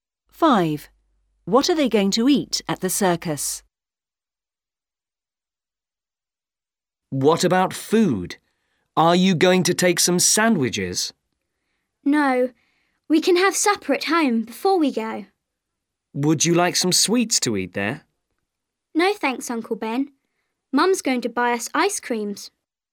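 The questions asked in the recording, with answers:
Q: What are they going to eat at the circus?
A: Ice creams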